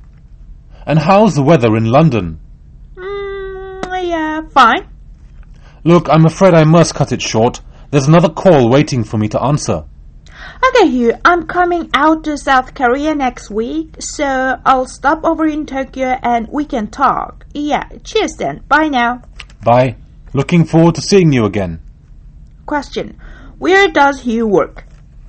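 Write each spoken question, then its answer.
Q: Where does Hugh work?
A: Tokyo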